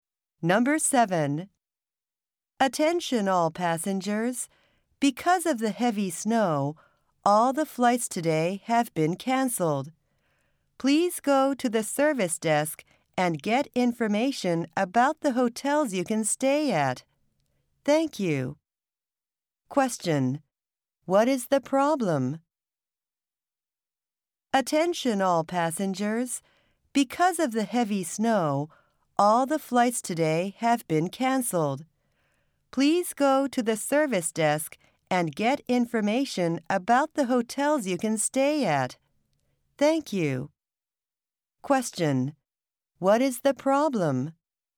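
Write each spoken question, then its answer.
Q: What is the problem?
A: All the flights today have been canceled because of heavy snow.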